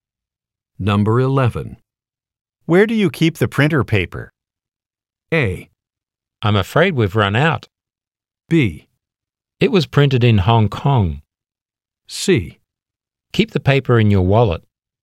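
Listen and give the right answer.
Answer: A: I'm afraid we've run out.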